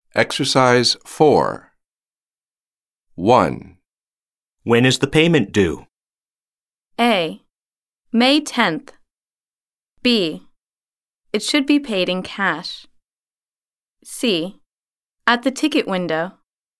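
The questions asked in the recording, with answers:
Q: When is the payment due?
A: A: May 10th.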